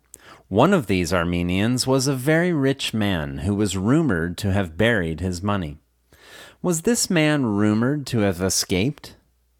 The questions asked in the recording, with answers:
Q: Was this man rumored to have escaped?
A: No, this man wasn't rumored to have escaped.